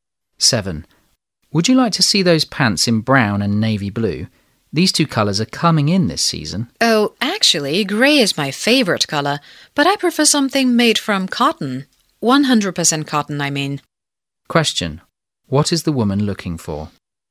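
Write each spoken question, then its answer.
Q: What is the woman looking for?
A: Grey pants made of 100% cotton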